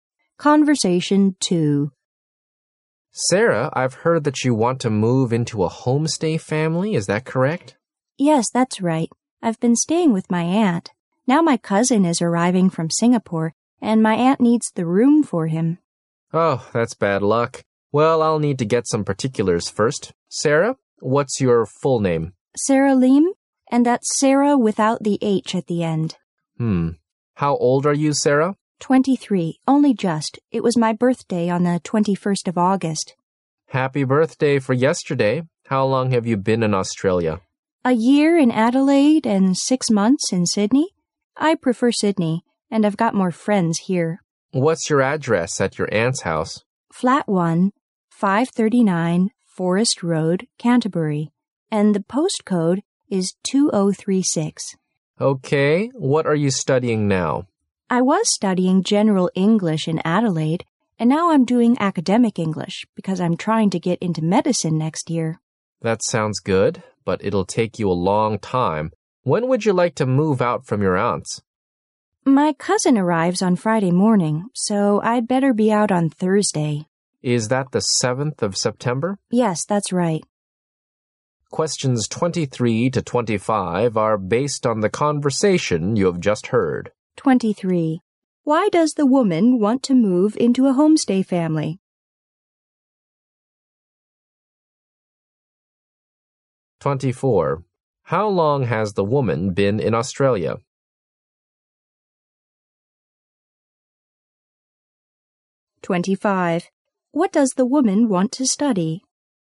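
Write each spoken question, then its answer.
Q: Why does the woman want to move into a homestay family?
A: Her aunt needs the room for her cousin

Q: How long has the woman been in Australia?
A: One and a half years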